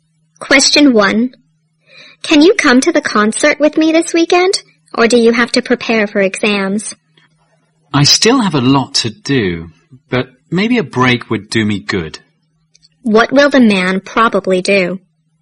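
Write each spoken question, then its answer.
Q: What will the man probably do?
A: Go to the concert with the woman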